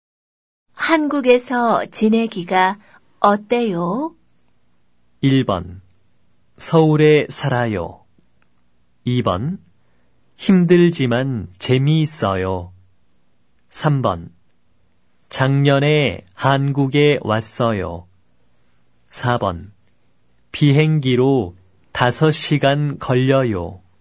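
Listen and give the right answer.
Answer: 2번: 힘들지만 재미있어요.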